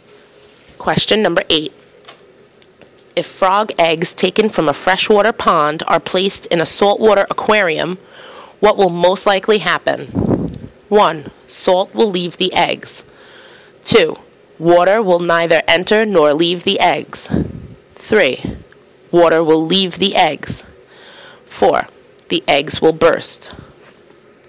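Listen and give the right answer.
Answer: 3: Water will leave the eggs.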